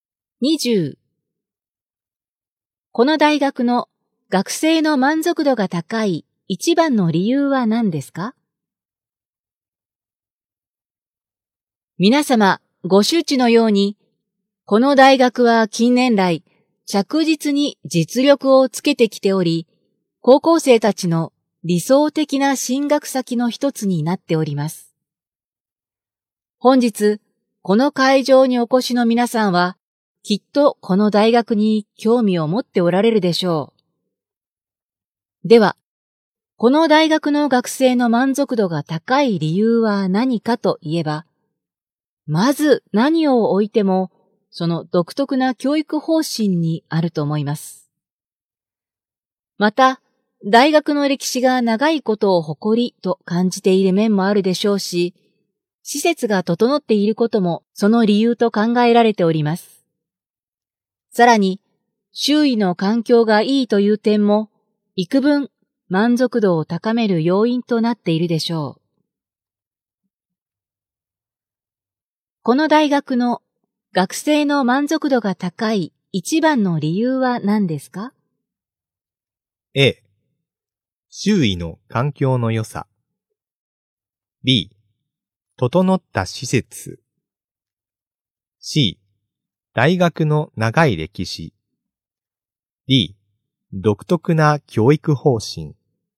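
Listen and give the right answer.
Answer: D: 独特な教育方針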